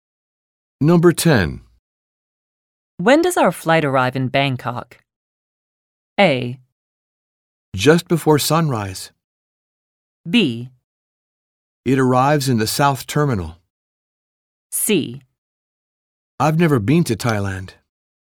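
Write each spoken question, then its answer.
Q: When does our flight arrive in Bangkok?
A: A: Just before sunrise.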